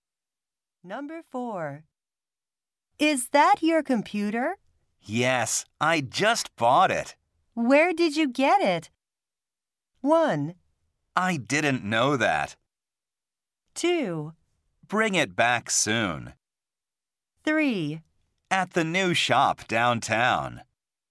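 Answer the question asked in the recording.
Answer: 3: At the new shop downtown.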